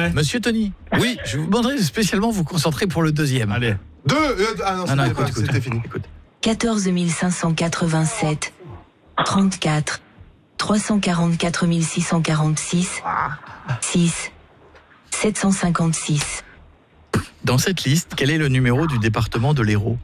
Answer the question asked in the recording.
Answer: 34, voilà, bravo.